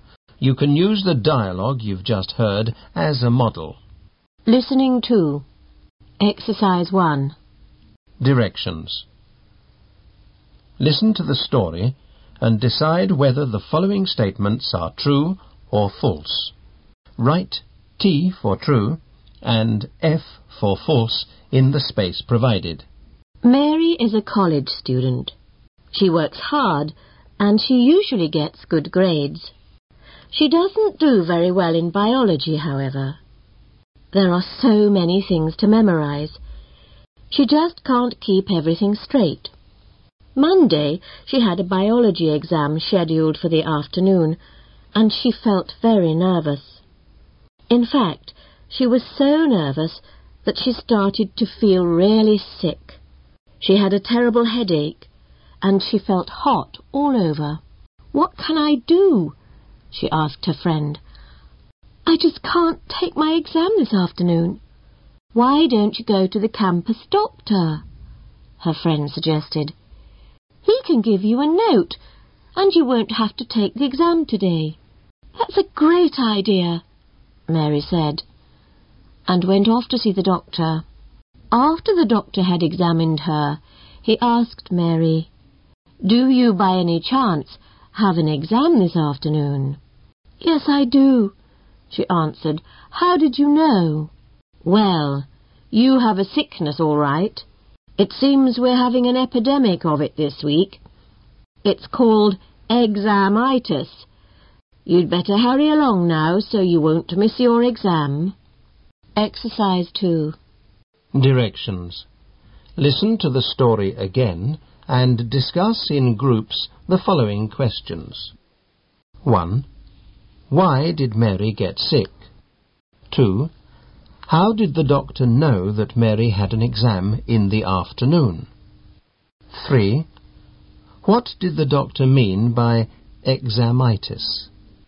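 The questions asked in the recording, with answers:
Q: Why did Mary get sick?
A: She was very nervous about her biology exam.

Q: How did the doctor know that Mary had an exam in the afternoon?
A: Many students were having the same sickness that week before exams (an epidemic of examitis).

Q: What did the doctor mean by examitis?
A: Feeling sick from nervousness about an exam.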